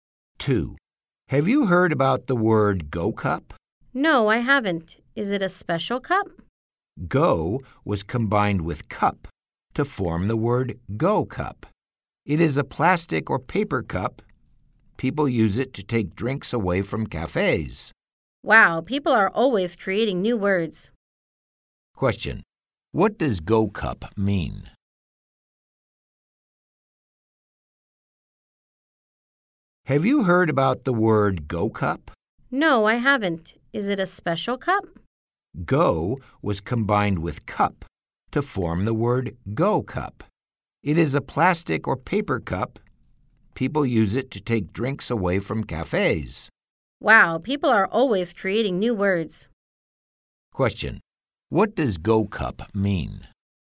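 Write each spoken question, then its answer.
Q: Question. What does Go Cup mean?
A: A plastic or paper cup used to take drinks away from cafes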